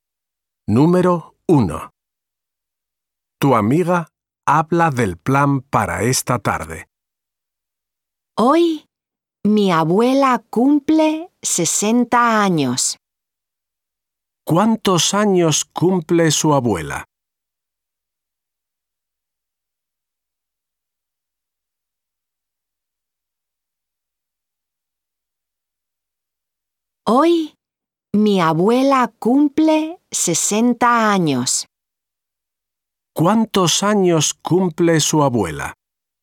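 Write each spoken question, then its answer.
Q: ¿Cuántos años cumple su abuela?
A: 60 años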